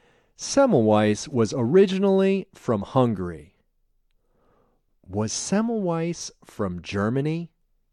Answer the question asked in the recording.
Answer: No, he wasn't from Germany.